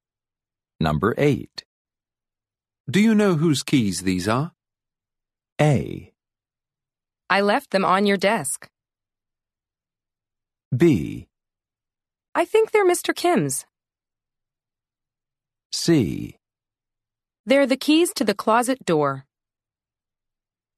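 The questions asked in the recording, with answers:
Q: Do you know whose keys these are?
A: B: I think they're Mr. Kim's.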